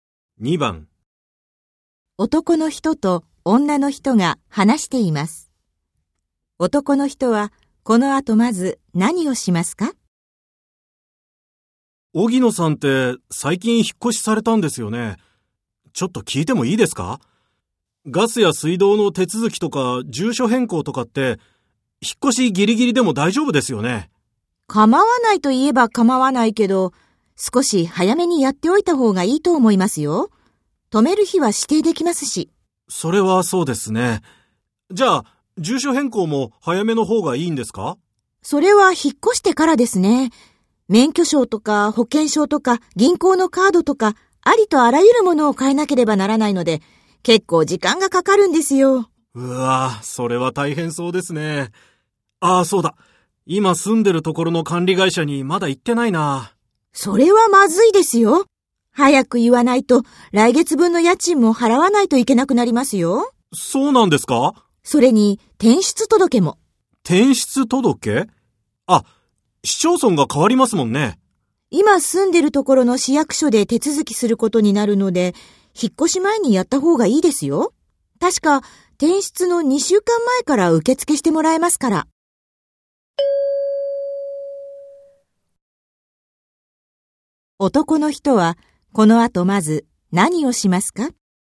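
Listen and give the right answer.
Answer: 今住んでいるところの管理会社に連絡する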